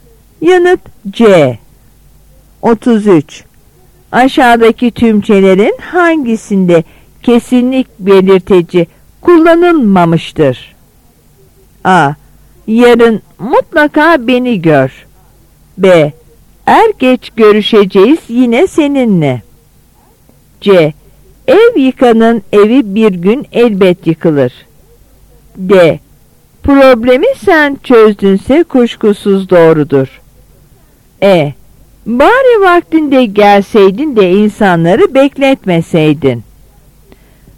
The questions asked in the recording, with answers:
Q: Aşağıdaki tümçelerin hangisinde kesinlik belirteci kullanılmamıştır?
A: Yanıt E.